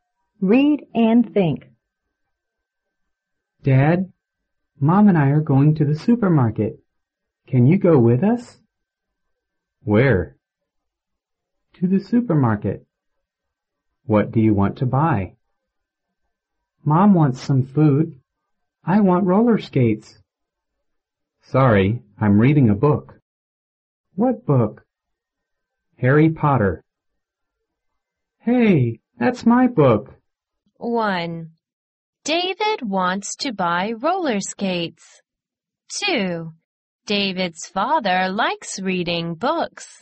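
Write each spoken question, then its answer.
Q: David wants to buy roller skates.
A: True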